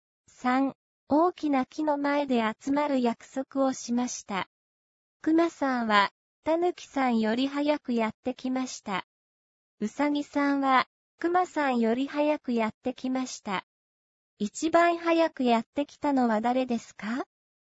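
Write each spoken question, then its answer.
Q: 一番早くやってきたのは誰ですか?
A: ウサギさん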